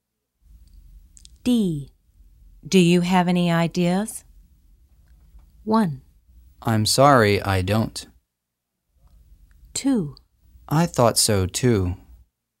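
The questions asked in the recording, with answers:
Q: Do you have any ideas?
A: 1: I'm sorry, I don't.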